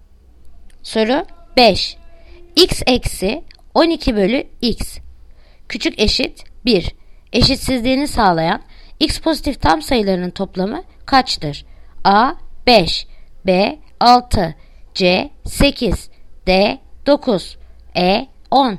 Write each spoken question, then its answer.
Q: X eksi 12 bölü X Küçük eşit 1 Eşitsizliğini sağlayan x pozitif tam sayılarının toplamı kaçtır?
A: Yanıt Edirne 10